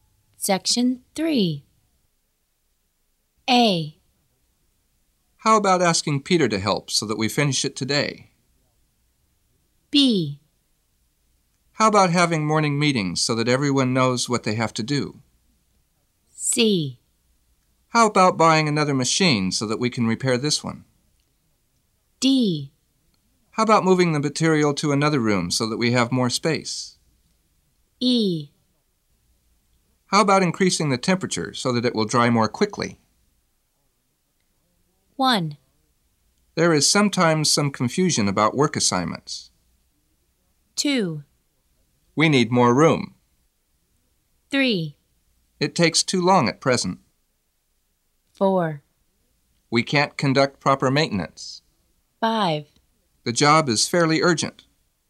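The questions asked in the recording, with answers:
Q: There is sometimes some confusion about work assignments.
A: B: How about having morning meetings so that everyone knows what they have to do?

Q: We need more room.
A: D: How about moving the material to another room so that we have more space?

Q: It takes too long at present.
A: E: How about increasing the temperature so that it will dry more quickly?

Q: We can't conduct proper maintenance.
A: C: How about buying another machine so that we can repair this one?

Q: The job is fairly urgent.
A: A: How about asking Peter to help so that we finish it today?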